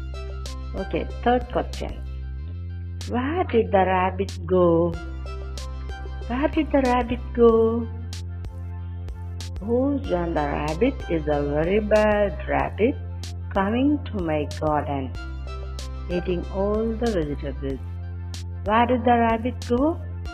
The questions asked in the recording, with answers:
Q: Where did the rabbit go?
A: The rabbit went to my garden.